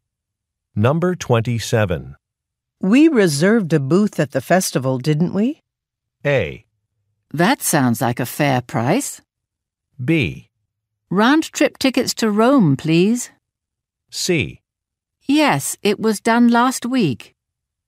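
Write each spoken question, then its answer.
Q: We reserved a booth at the festival, didn't we?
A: C: Yes, it was done last week.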